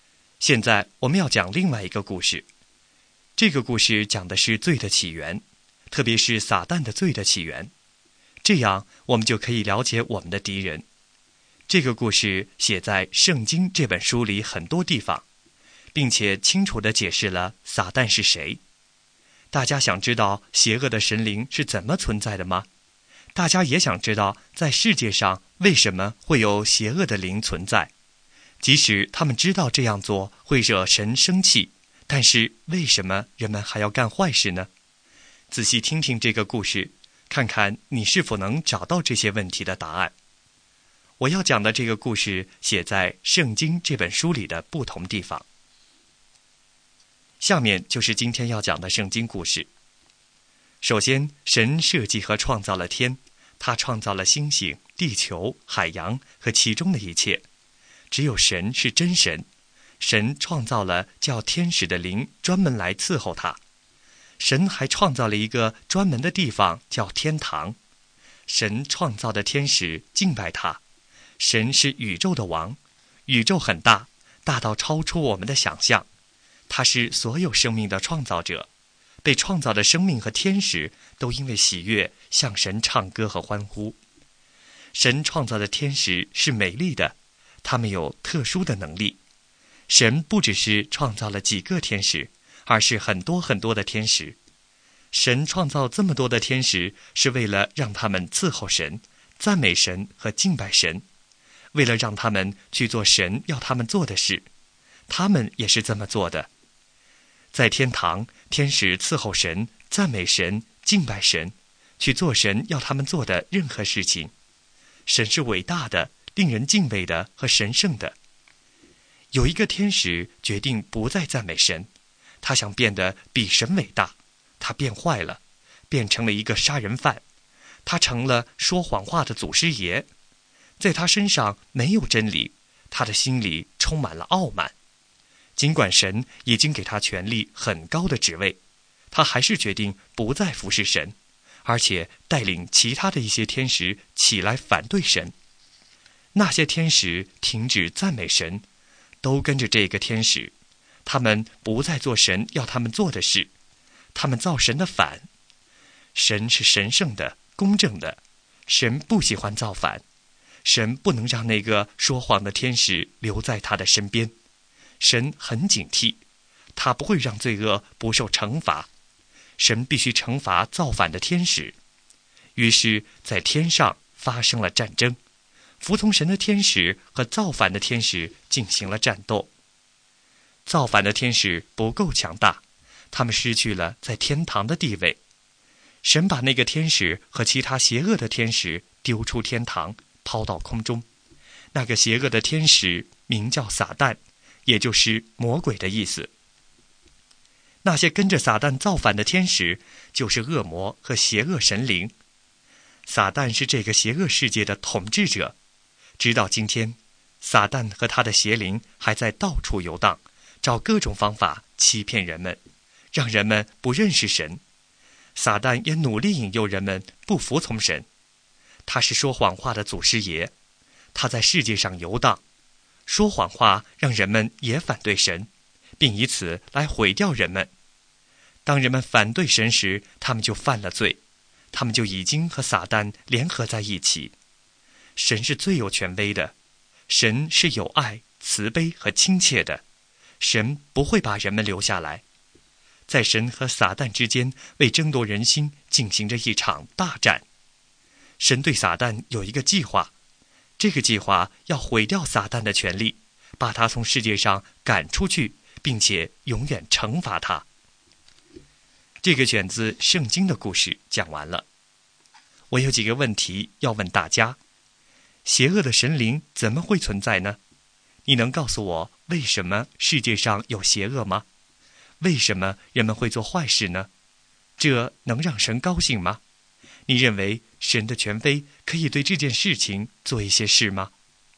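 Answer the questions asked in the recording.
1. 一个天使骄傲造反,带领其他天使反对神,被赶出天堂,成了撒旦和恶魔
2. 因为撒旦和他的邪灵被抛出天堂,在世界上游荡,欺骗人们
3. 撒旦说谎话引诱人们不服从神
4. 不能,会惹神生气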